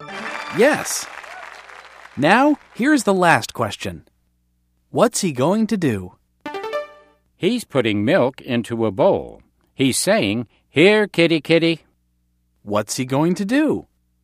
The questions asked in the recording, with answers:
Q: What's he going to do?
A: I get it. He has a cat, and he's going to feed his cat.